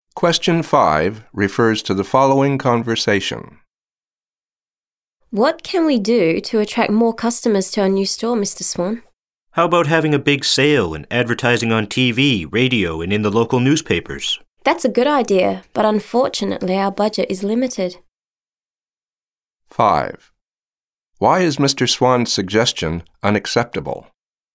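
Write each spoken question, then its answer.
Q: Why is Mr. Swan's suggestion unacceptable?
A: Because their budget is limited.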